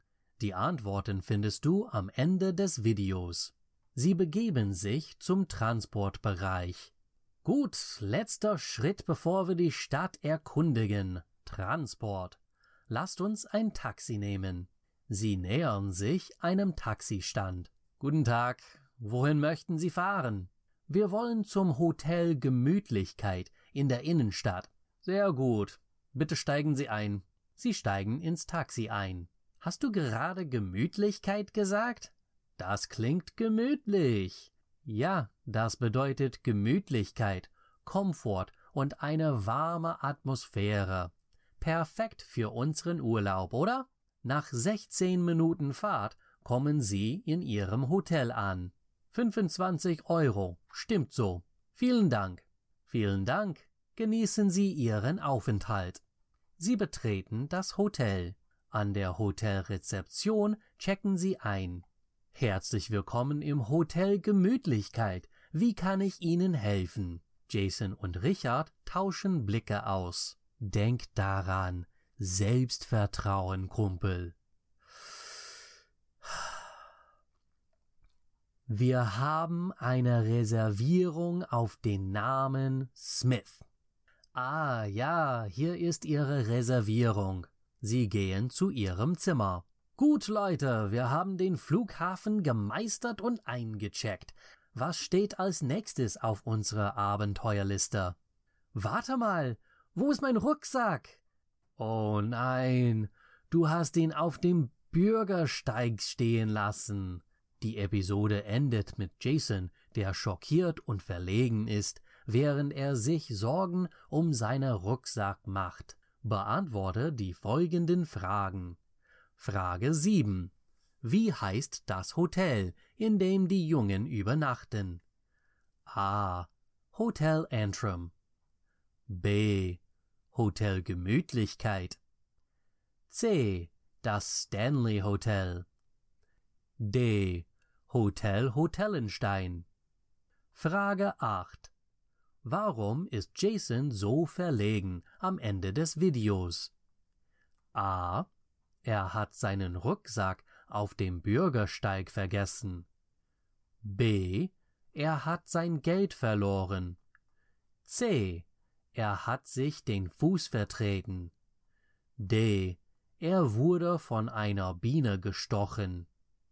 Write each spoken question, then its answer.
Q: Wie heißt das Hotel, in dem die Jungen übernachten?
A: Hotel Gemütlichkeit.

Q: Warum ist Jason so verlegen am Ende des Videos?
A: Die richtige Antwort ist A.